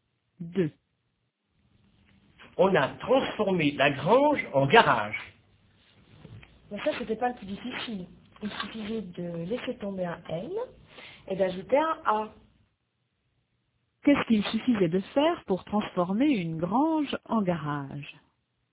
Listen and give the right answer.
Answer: Il suffisait de laisser tomber un N et d'ajouter un A.